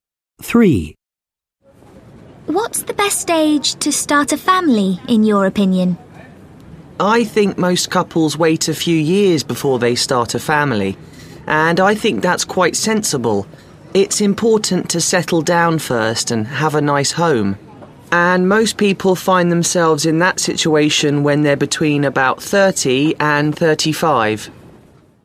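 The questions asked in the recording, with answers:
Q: What's the best age to start a family, in your opinion?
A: Between about 30 and 35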